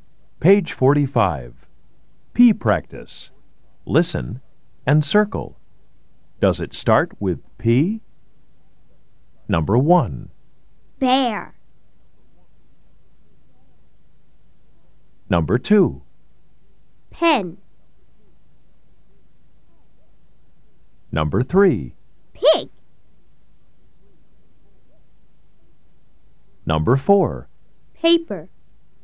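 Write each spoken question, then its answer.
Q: Bear.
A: No

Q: Paper.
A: Yes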